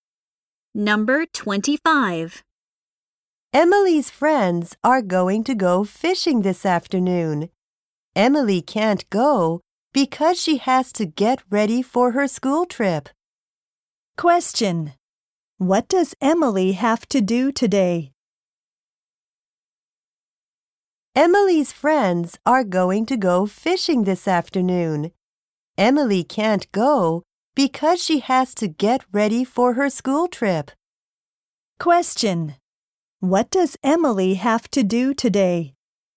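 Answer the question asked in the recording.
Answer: Get ready for her school trip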